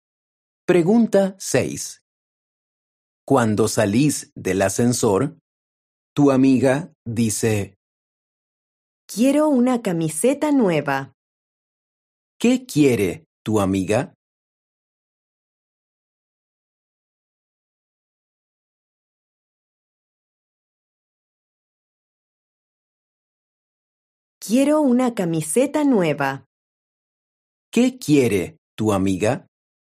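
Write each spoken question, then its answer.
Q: ¿Qué quiere tu amiga?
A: una camiseta nueva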